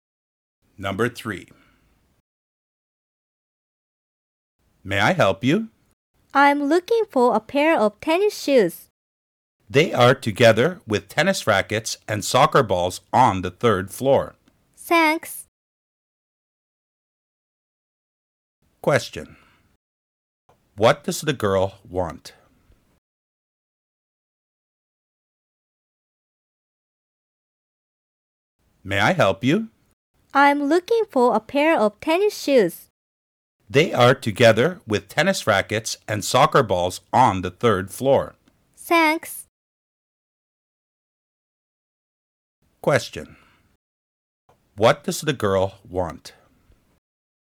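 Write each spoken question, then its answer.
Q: What does the girl want?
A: A pair of tennis shoes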